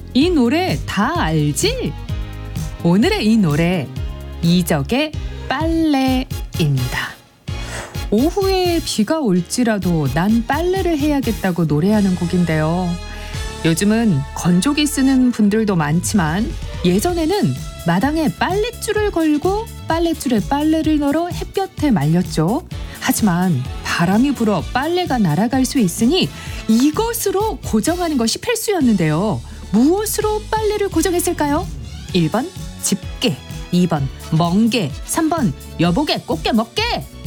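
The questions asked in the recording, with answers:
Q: 무엇으로 빨래를 고정했을까요?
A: 1: 집게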